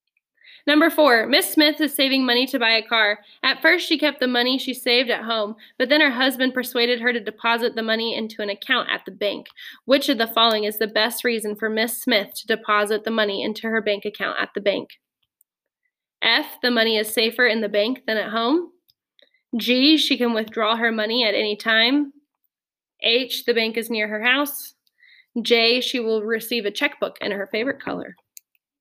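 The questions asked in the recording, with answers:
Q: Which of the following is the best reason for Miss Smith to deposit the money into her bank account at the bank?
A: F: the money is safer in the bank than at home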